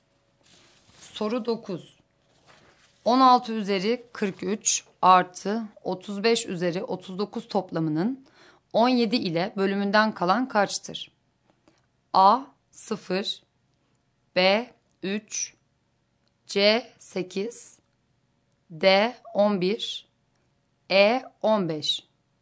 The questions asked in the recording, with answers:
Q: 16 üzeri 43 artı 35 üzeri 39 toplamının 17 ile bölümünden kalan kaçtır?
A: Doğru cevap A şıkkı.